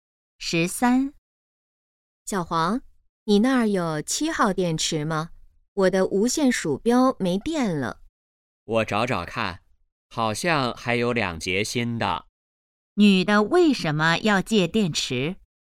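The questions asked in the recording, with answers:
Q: 女的为什么要借电池?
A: 无线鼠标没电了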